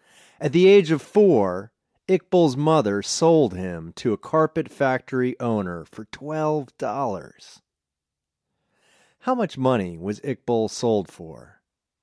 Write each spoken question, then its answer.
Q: How much money was Iqbal sold for?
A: Iqbal was sold for $12.